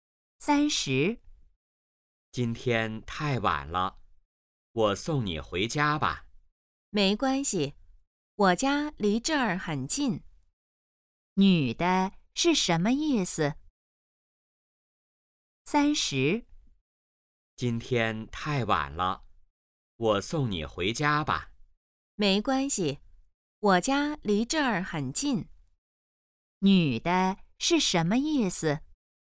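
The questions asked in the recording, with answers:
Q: 女的是什么意思?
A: 不用送,她家很近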